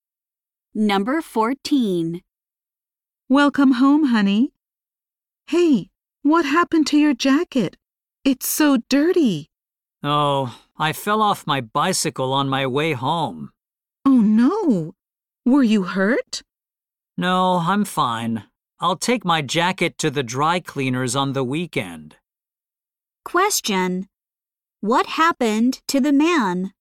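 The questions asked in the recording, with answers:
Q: What happened to the man?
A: He fell off his bicycle.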